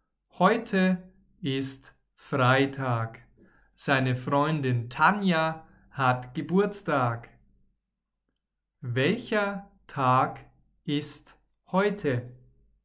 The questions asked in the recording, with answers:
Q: Welcher Tag ist heute?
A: Heute ist Freitag.